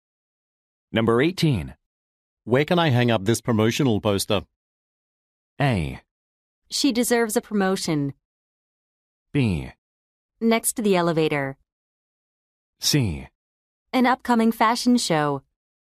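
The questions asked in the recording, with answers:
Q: Where can I hang up this promotional poster?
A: B: Next to the elevator.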